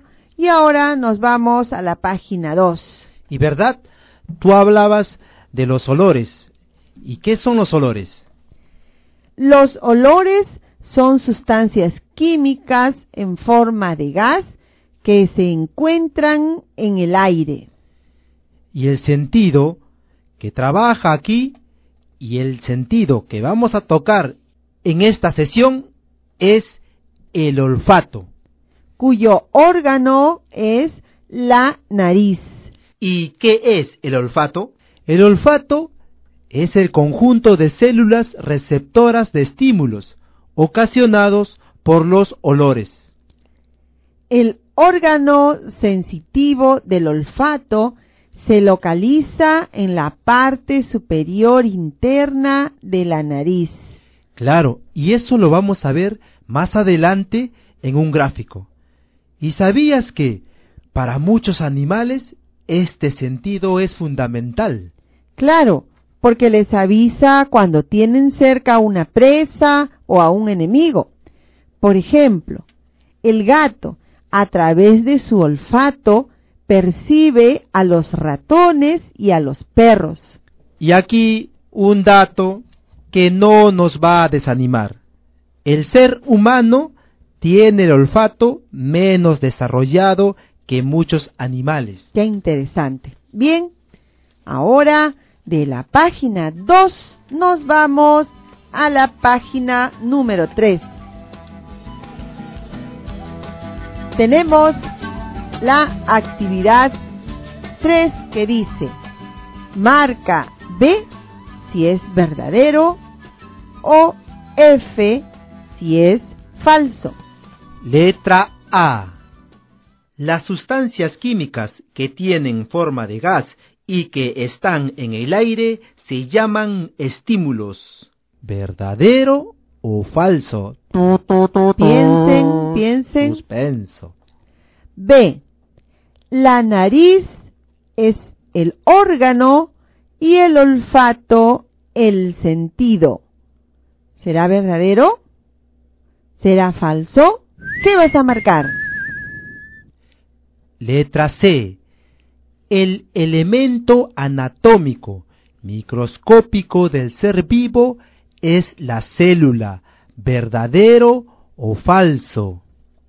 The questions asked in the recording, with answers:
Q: Las sustancias químicas que tienen forma de gas y que están en el aire se llaman estímulos.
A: Letra A, marcamos la letra F, porque las sustancias químicas que tienen forma de gas y que están en el aire se llaman olores.

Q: La nariz es el órgano y el olfato el sentido.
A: Es cierto que la nariz es el órgano y el olfato el sentido.